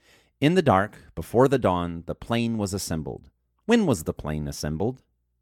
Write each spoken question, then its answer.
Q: When was the plane assembled?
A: The plane was assembled in the dark before the dawn.